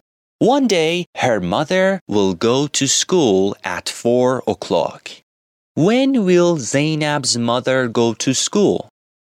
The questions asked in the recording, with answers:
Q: When will Zainab's mother go to school?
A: Awesome! She will go to school at 4 o'clock.